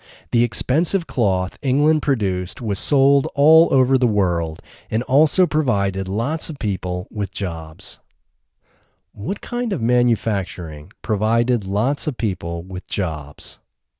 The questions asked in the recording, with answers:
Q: What kind of manufacturing provided lots of people with jobs?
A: Cloth manufacturing provided lots of people with jobs.